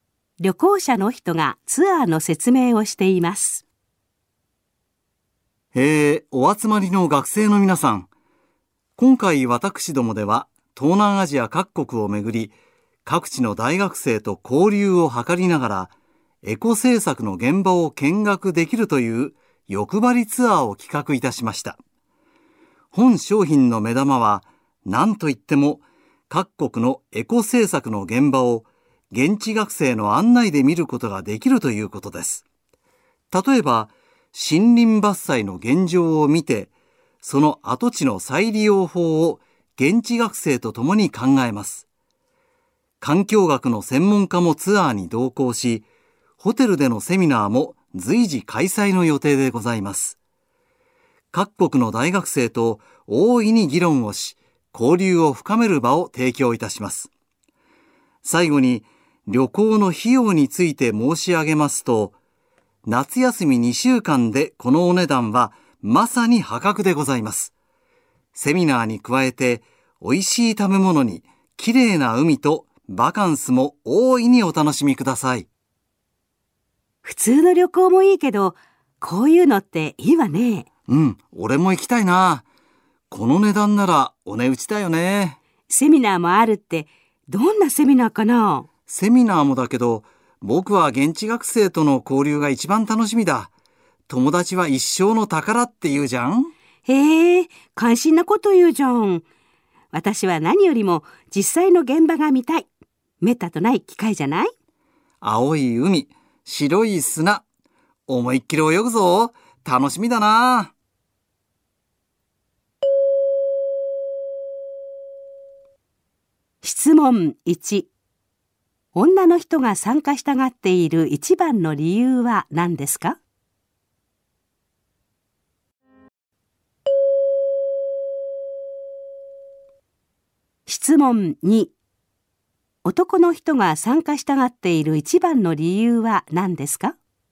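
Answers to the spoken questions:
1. エコ政策の現場を実際に見たいから
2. 現地学生との交流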